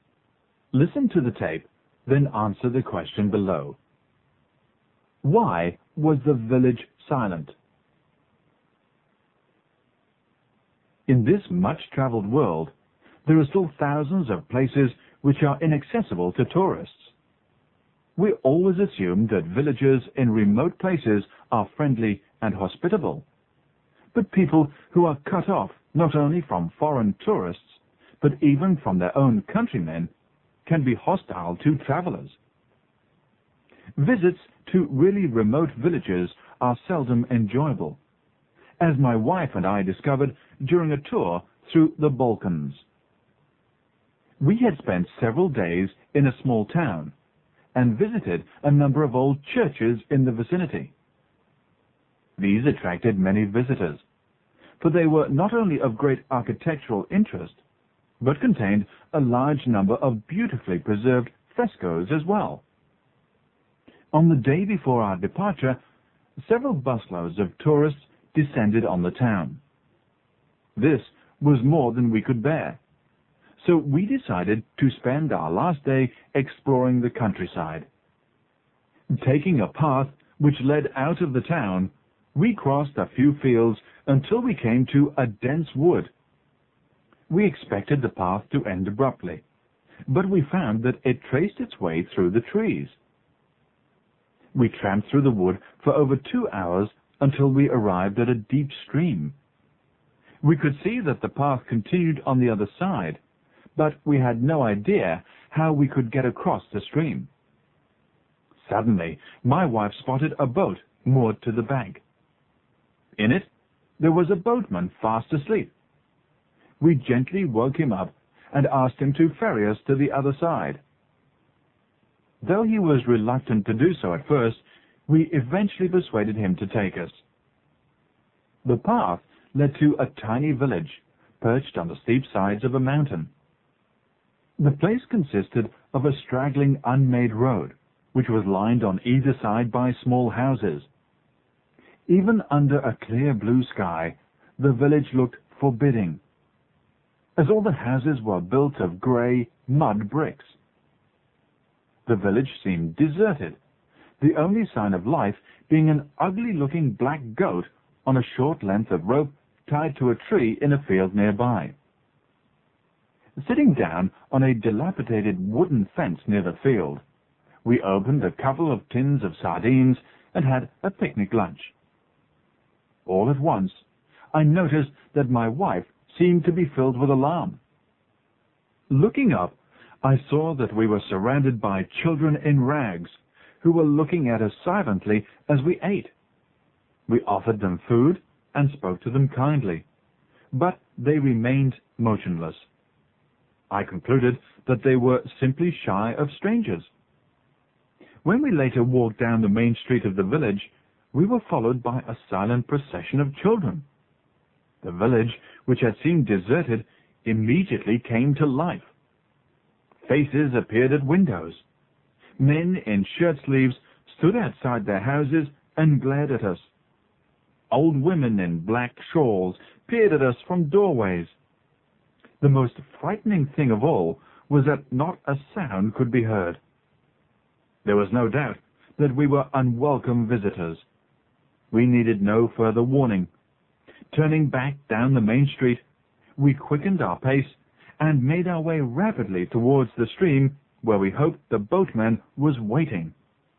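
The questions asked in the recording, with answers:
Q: Why was the village silent?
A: The villagers were cut off from outsiders and hostile to strangers; they silently showed the visitors they were unwelcome.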